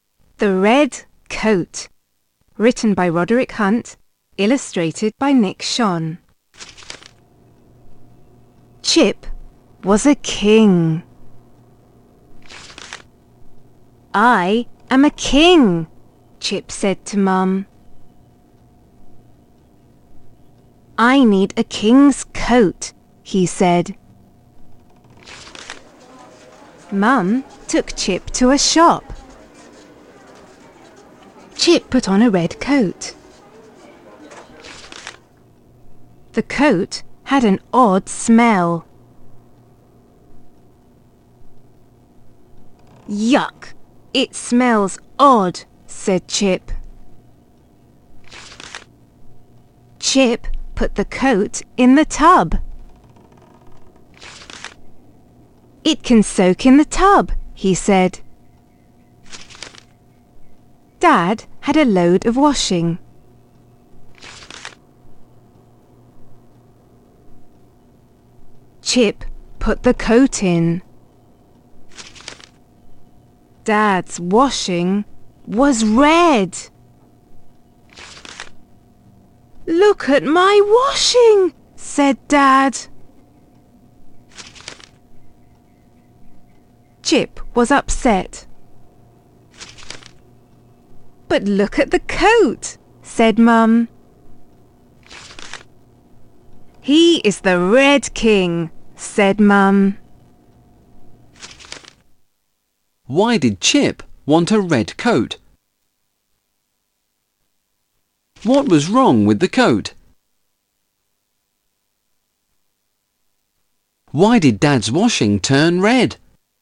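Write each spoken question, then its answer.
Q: Why did Chip want a red coat?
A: He was a king and needed a king's coat

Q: What was wrong with the coat?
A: It had an odd smell

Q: Why did Dad's washing turn red?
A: Chip put the red coat in with the washing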